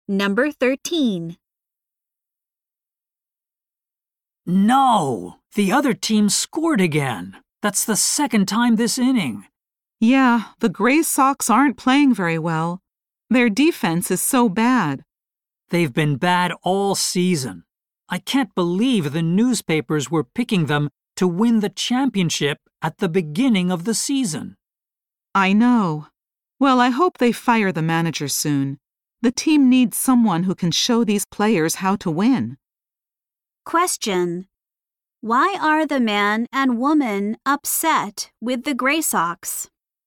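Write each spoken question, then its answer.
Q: Why are the man and woman upset with the Gray Sox?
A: The team is playing badly; its defense is poor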